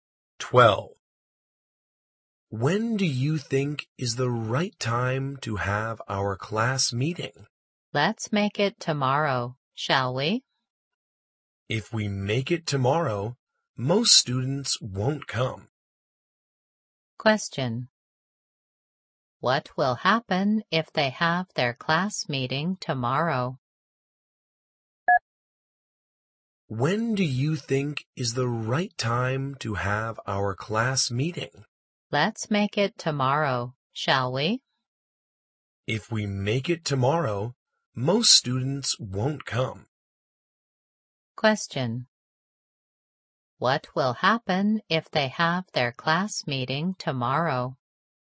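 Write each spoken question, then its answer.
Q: What will happen if they have their class meeting tomorrow?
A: Most students won't come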